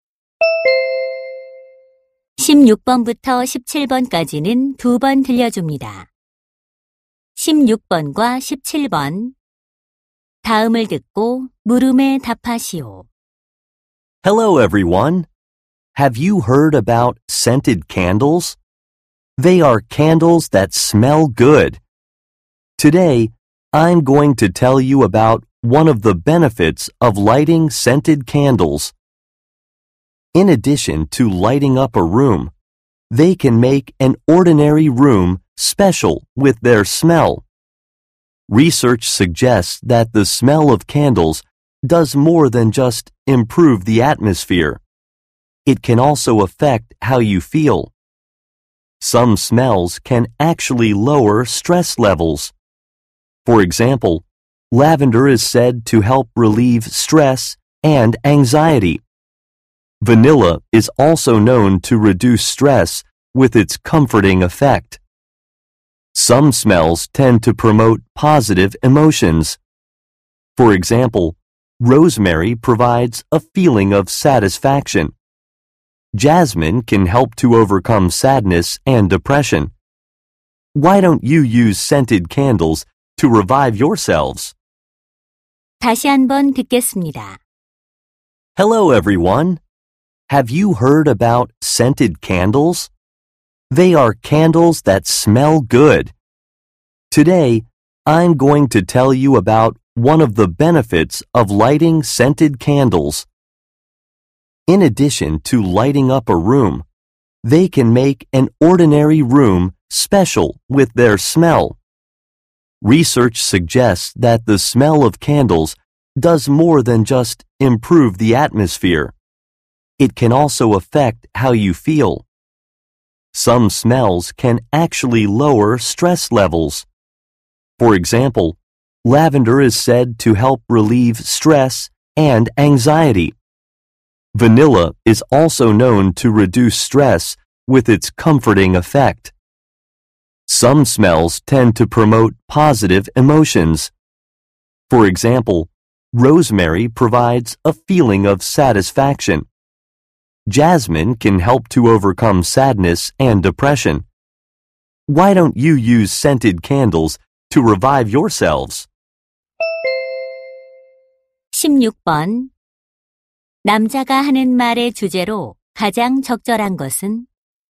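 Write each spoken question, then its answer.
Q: 남자가 하는 말의 주제로 가장 적절한 것은?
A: 향초의 향이 감정에 미치는 영향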